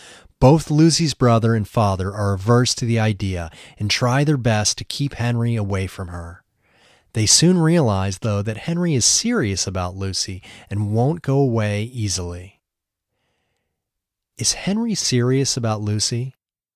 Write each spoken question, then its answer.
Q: Is Henry serious about Lucy?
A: Yes, he is serious about Lucy.